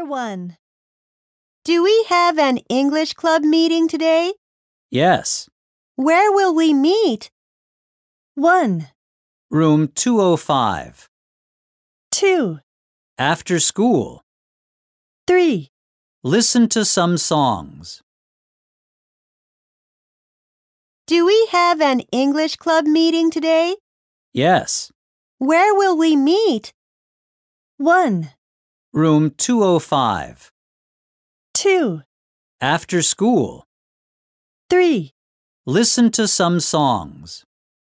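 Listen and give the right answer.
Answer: 1: Room 205.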